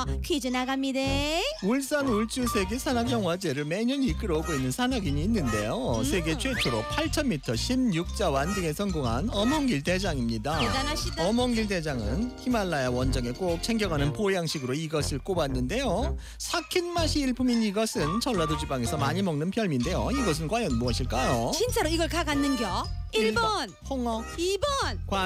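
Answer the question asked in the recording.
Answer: 1: 홍어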